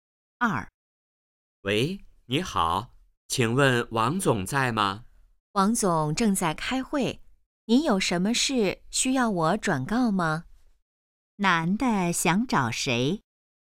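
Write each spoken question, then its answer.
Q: 男的想找谁?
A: 王总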